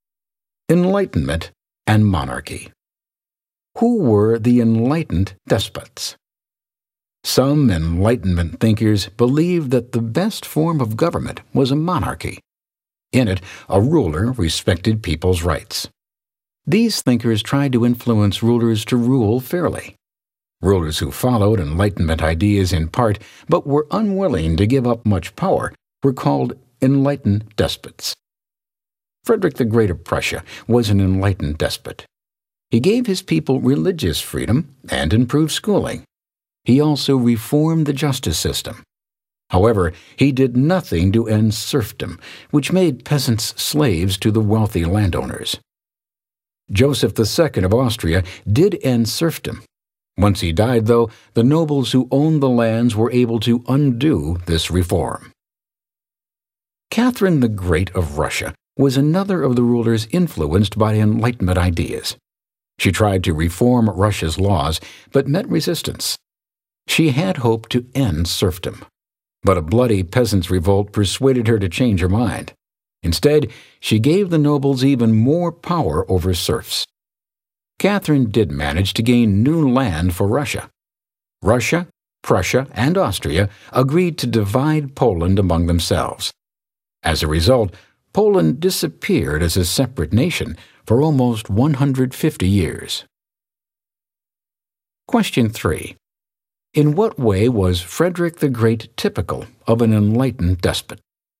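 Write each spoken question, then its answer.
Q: In what way was Frederick the Great typical of an enlightened despot?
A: He made some reforms, like religious freedom, better schools and a reformed justice system, but kept his power and did not end serfdom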